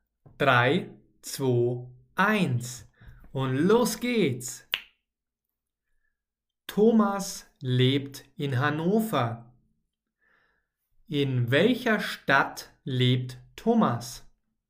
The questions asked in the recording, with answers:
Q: In welcher Stadt lebt Thomas?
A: In Hannover. Thomas lebt in Hannover.